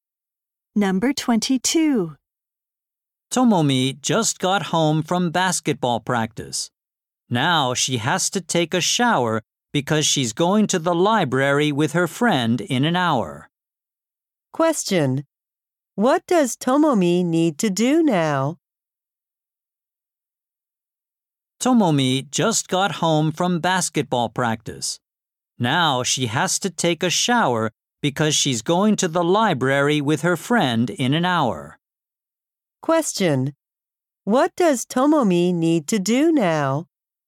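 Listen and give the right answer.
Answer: Take a shower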